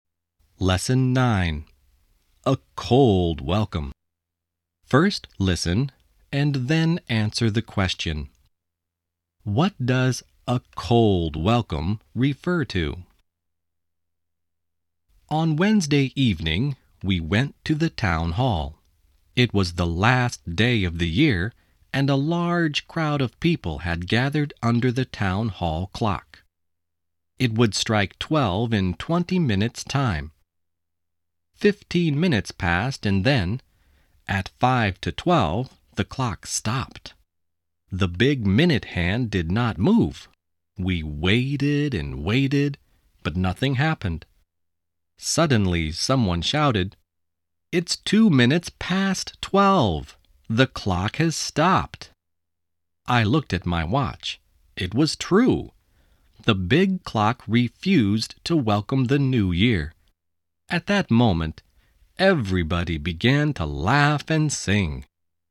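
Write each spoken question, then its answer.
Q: What does a cold welcome refer to?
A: The town hall clock stopped and refused to welcome the new year.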